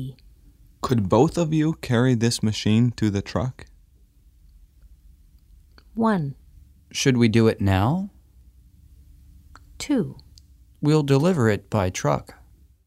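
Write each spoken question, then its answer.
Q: Could both of you carry this machine to the truck?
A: 1: Should we do it now?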